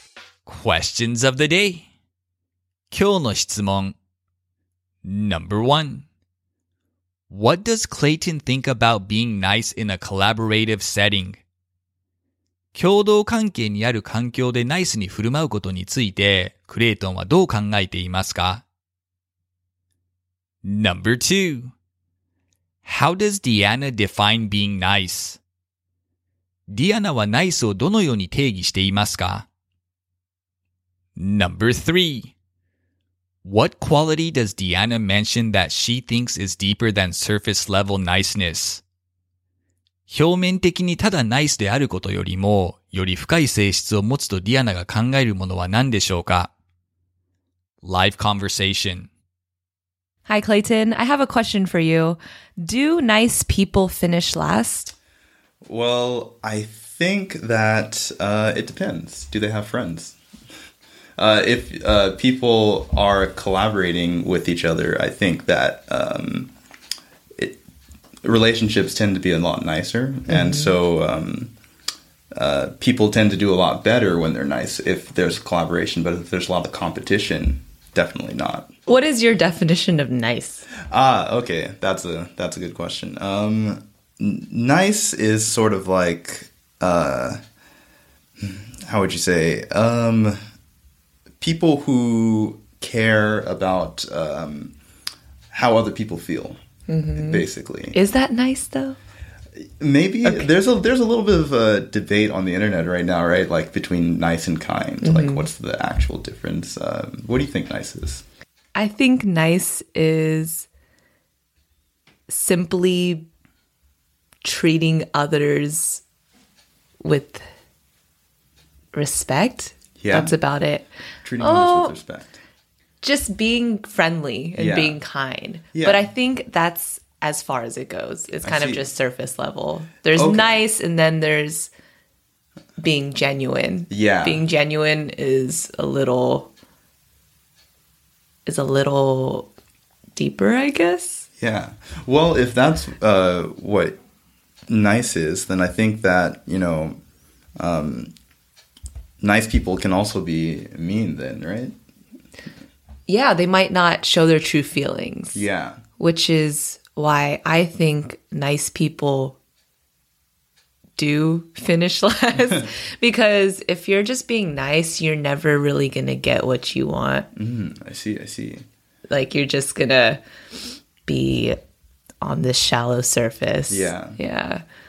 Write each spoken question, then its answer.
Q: What does Clayton think about being nice in a collaborative setting?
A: He thinks it can be beneficial for working relationships.

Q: How does Diana define being nice?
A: She thinks being nice means treating others with respect.

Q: What quality does Diana mention that she thinks is deeper than surface level niceness?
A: She thinks being genuine and true to one's feelings is deeper than simply being nice.